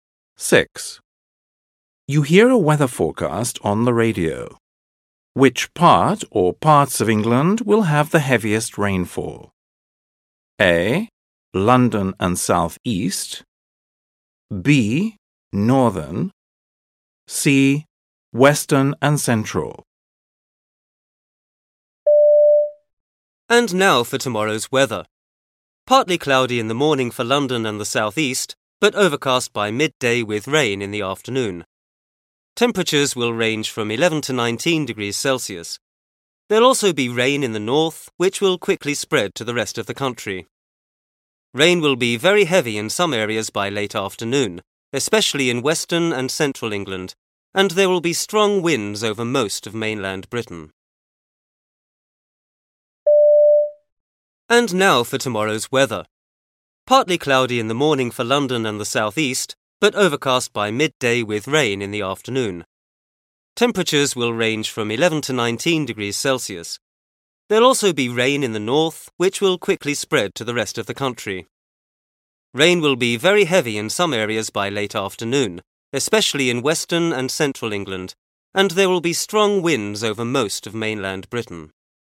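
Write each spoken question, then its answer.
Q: Which part or parts of England will have the heaviest rainfall?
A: C: Western and Central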